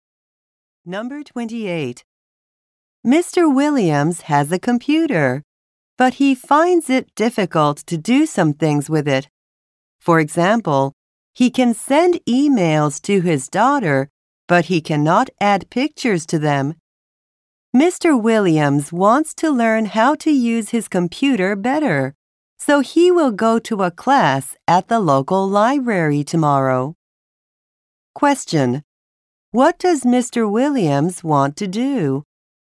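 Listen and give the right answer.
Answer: Learn to use his computer better.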